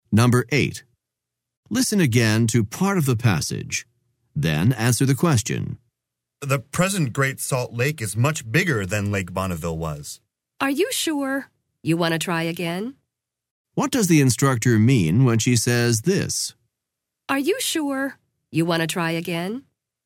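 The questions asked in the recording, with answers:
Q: What does the instructor mean when she says this?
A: She is suggesting the statement is wrong: Great Salt Lake is actually smaller than Lake Bonneville was.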